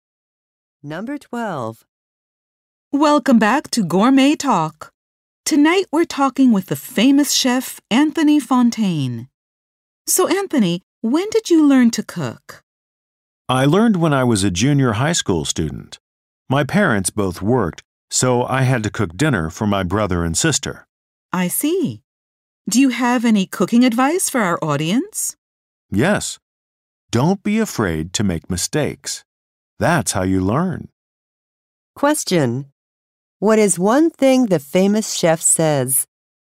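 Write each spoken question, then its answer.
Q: What is one thing the famous chef says?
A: Don't be afraid to make mistakes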